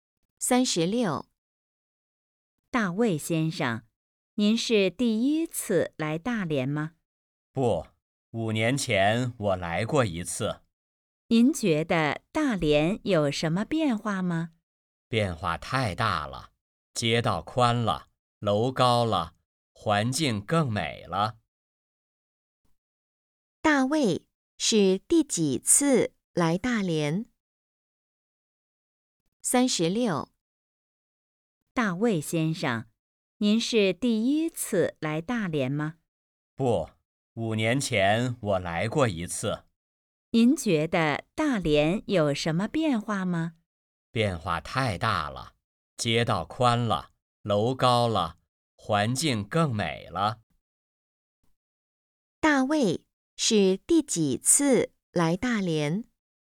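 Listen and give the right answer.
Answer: 第二次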